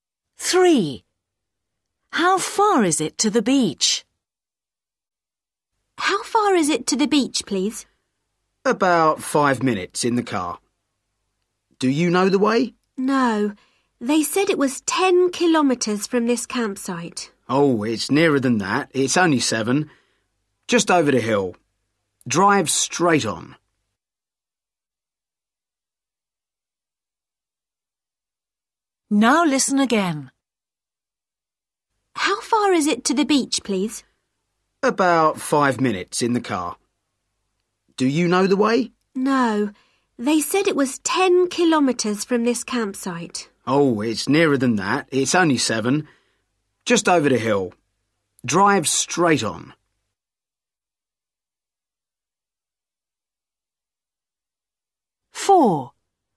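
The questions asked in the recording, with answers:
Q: How far is it to the beach?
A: 7 kilometres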